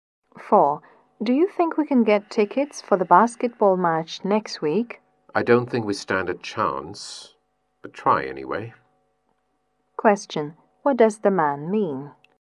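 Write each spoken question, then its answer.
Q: What does the man mean?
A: They probably won't get tickets, but it's worth trying.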